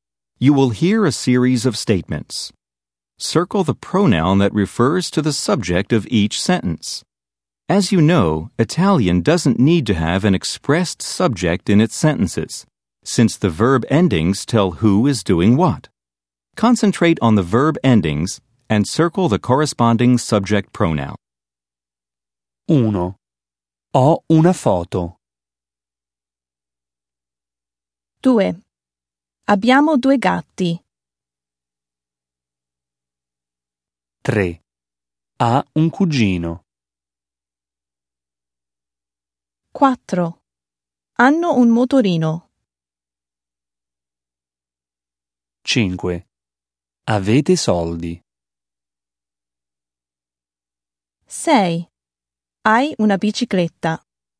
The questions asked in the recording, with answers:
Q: 1. Ho una foto.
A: 1. Io.

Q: 2. Abbiamo due gatti.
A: Noi.

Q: 3. Ha un cugino.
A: Lei.

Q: 4. Hanno un motorino.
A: Loro.

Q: 5. Avete soldi.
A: Voi.